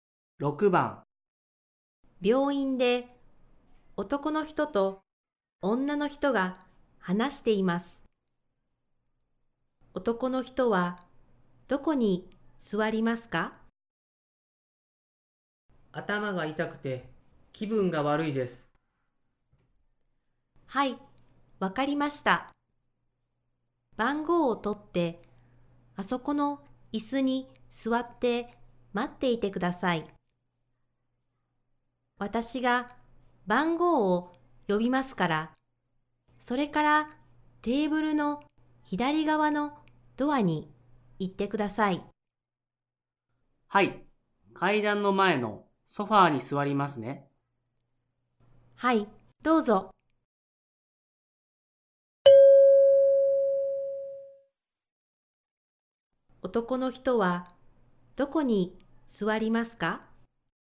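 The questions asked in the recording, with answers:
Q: 男の人はどこに座りますか?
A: 階段の前のソファー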